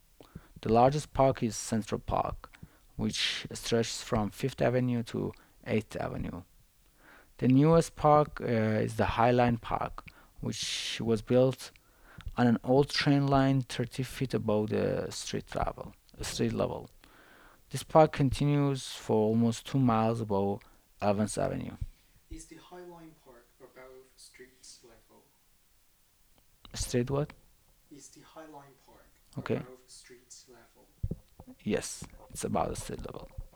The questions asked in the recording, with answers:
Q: Is the High Line Park above street level?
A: Yes, it is above the street level.